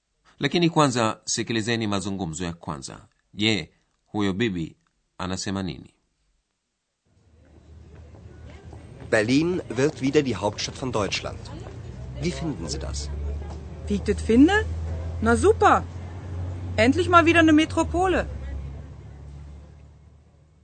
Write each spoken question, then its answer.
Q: je huyo bibi anasema nini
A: bibi huyo anayezungumza lahaja halisi ya kiberlin anafikiri ni supa kuwa hatimaye watapata tena kuitwa jiji